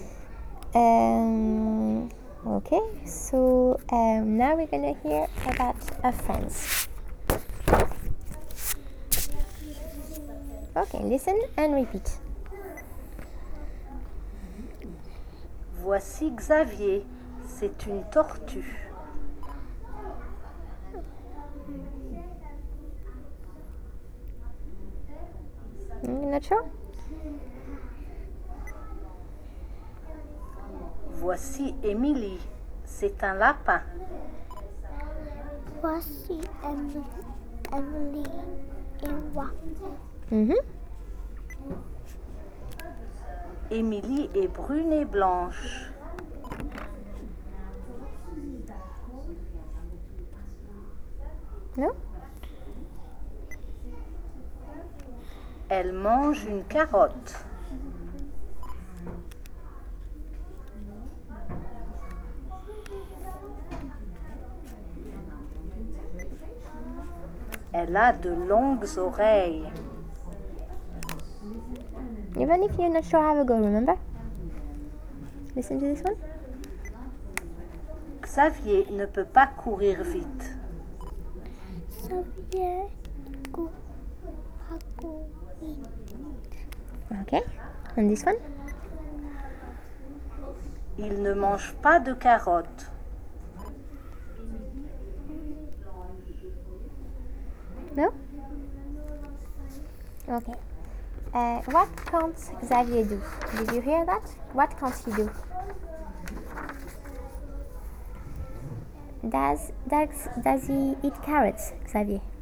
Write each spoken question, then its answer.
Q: Does he eat carrots, Xavier?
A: No, he doesn't.